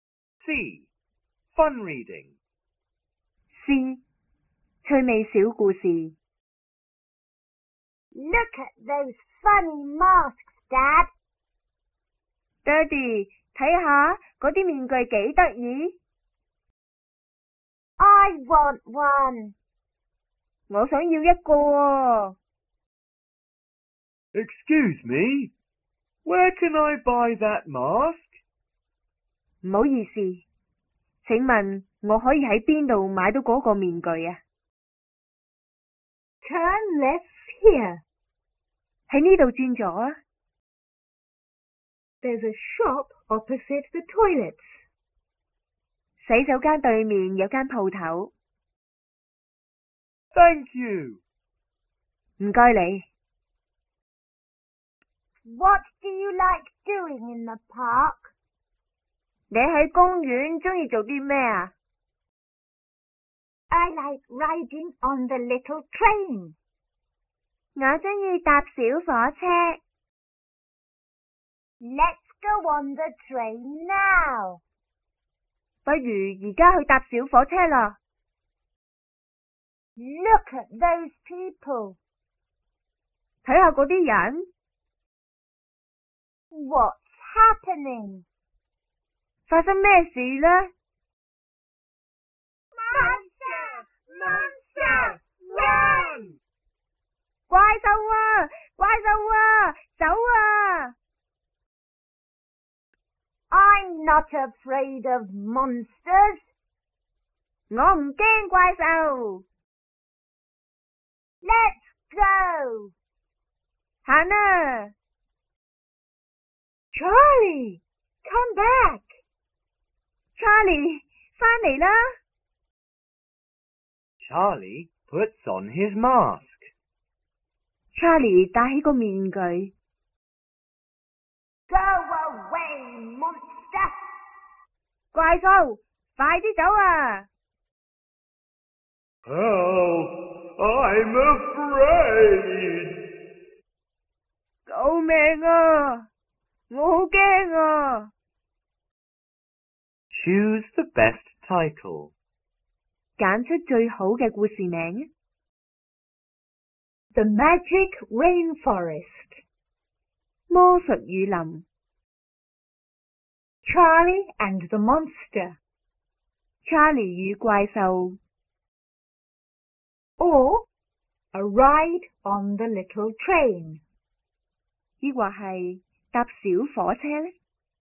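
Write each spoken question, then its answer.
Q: Choose the best title.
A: Charlie and the Monster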